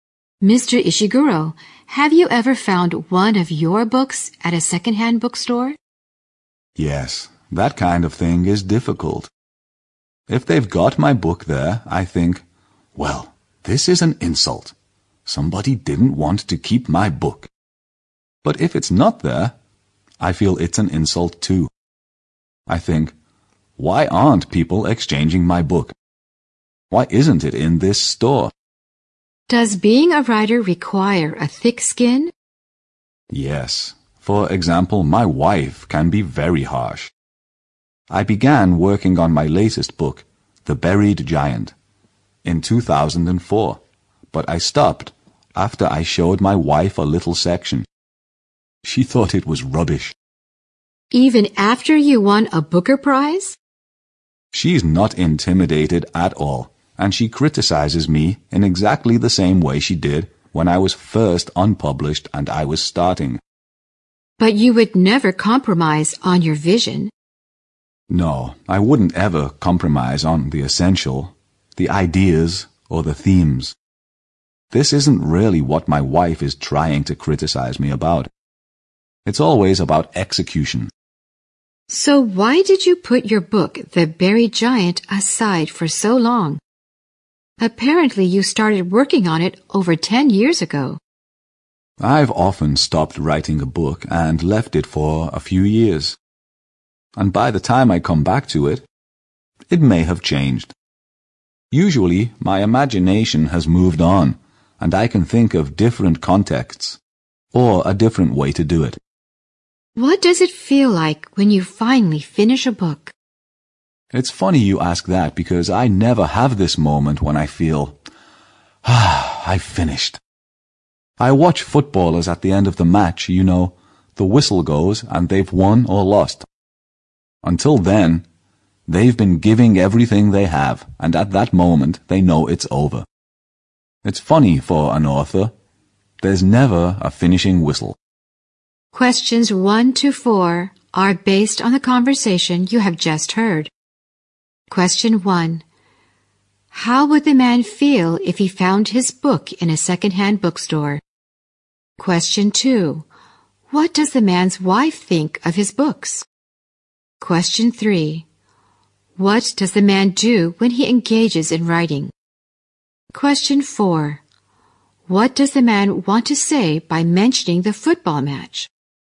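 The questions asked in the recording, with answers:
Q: How would the man feel if he found his book in a second-hand bookstore?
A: He would feel insulted.

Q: What does the man's wife think of his books?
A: She is very critical of them; she thought part of his latest book was rubbish.

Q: What does the man want to say by mentioning the football match?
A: That an author never has a clear moment when a book is finished.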